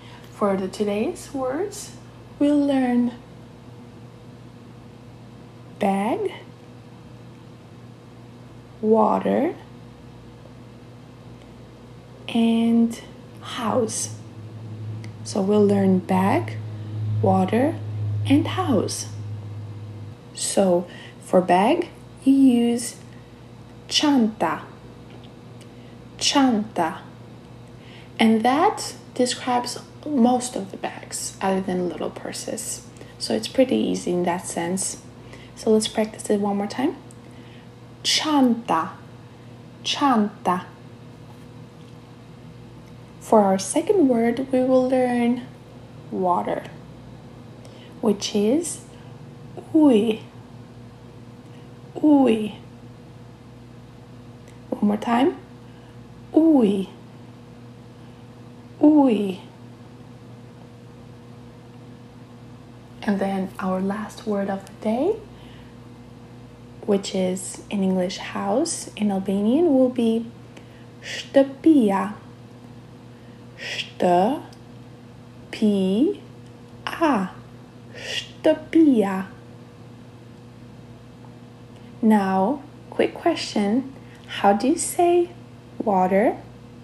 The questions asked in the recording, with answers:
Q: How do you say water?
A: Ooh.